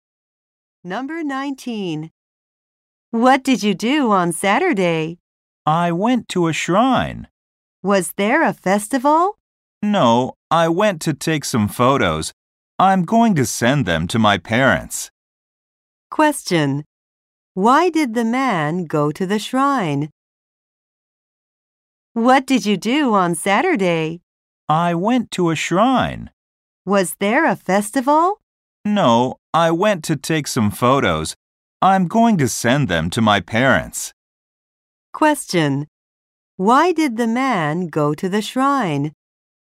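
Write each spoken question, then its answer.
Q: Why did the man go to the shrine?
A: To take some photos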